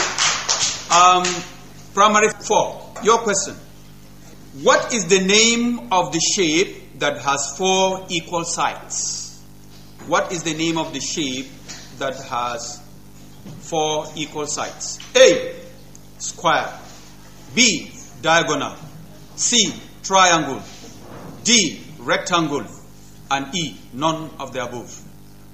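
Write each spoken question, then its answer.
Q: What is the name of the shape that has 4 equal sides?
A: A: square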